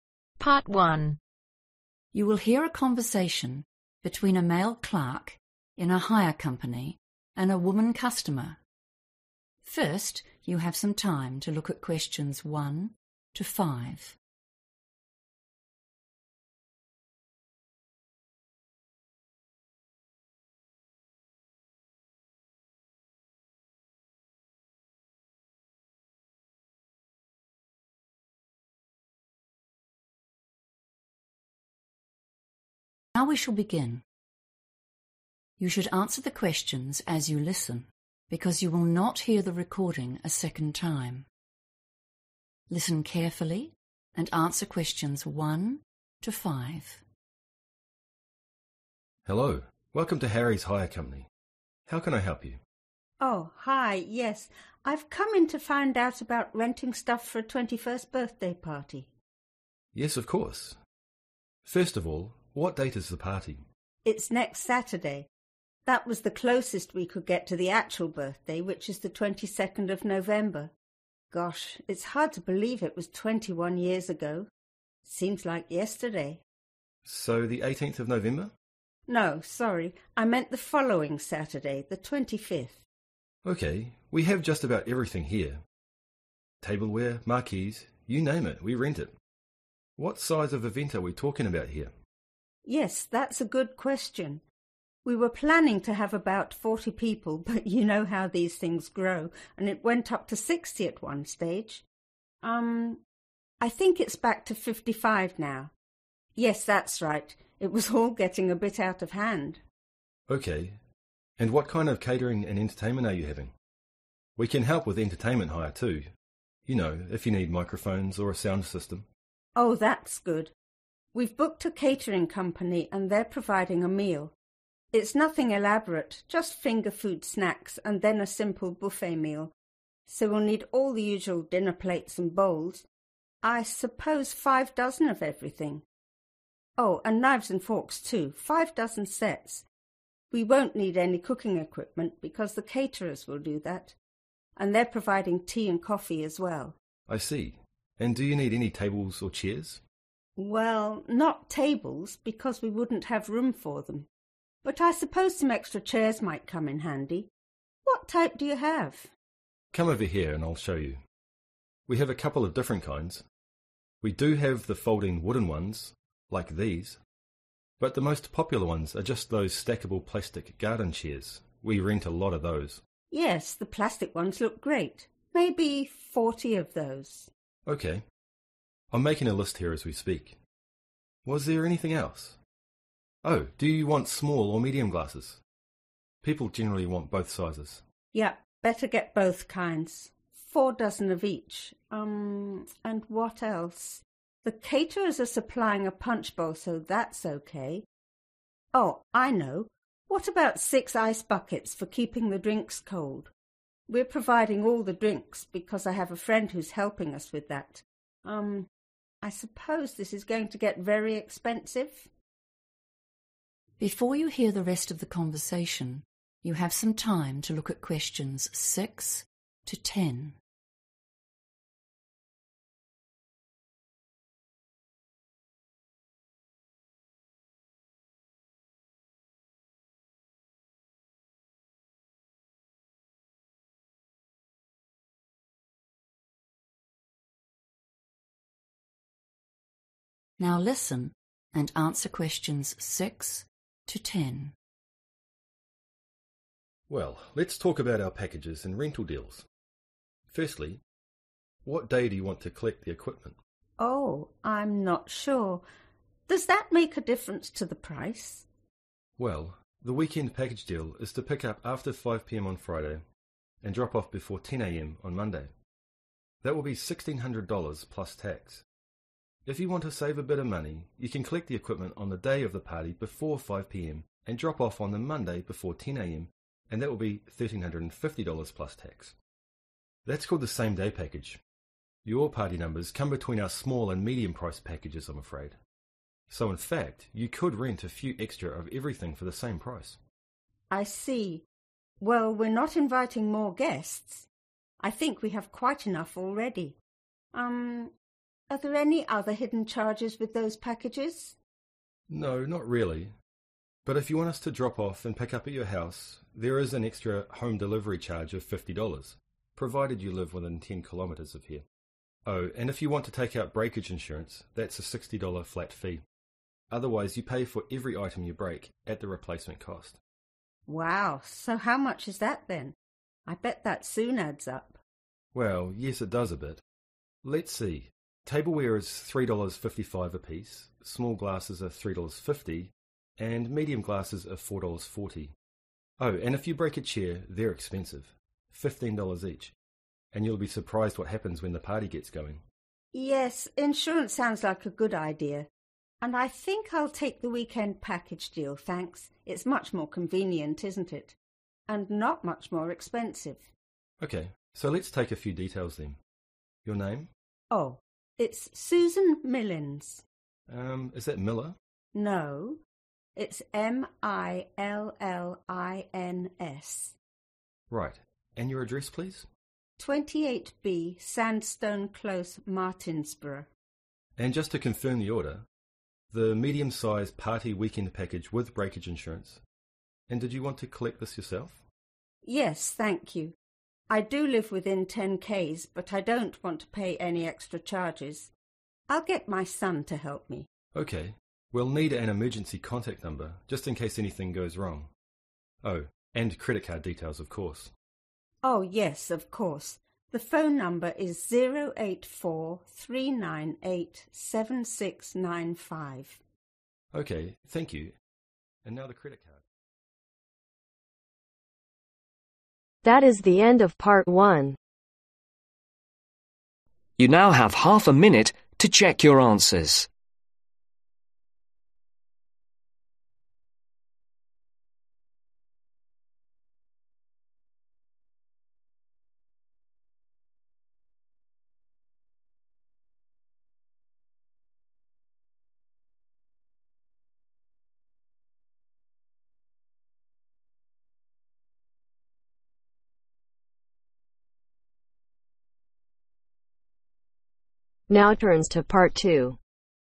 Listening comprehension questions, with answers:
Complete the notes below. Write NO MORE THAN TWO WORDS AND/OR A NUMBER for each answer.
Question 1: Day and date of event: (1)............ November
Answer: Saturday 25th/25

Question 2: Number attending event: (2)............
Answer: 55

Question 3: 5 dozen sets of (3)............ and forks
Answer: Knives

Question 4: 40 plastic (4)............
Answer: (garden) chairs

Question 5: six (5)............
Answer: Ice buckets

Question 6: (6)............ Package 5 p.m. Sat-10 a.m. Mon: $1350 + tax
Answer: Same-day/same day

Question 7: (7)............ $50 (within 10 km)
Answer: Home delivery

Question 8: small glasses- (8)............ per item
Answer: $3.50

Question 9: Full name: (9)............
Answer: Susan Millins

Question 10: Contact number: (10) 084 ............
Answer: 3987695